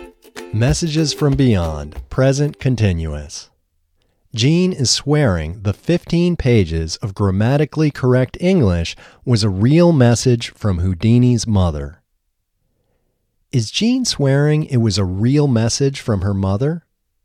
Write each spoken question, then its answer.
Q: Is Gene swearing it was a real message from her mother?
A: No, Gene isn't swearing it was a real message from her mother.